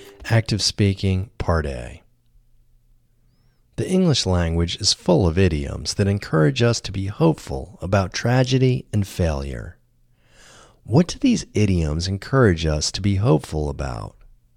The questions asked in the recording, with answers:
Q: What do these idioms encourage us to be hopeful about?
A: These idioms encourage us to be hopeful about tragedy and failure.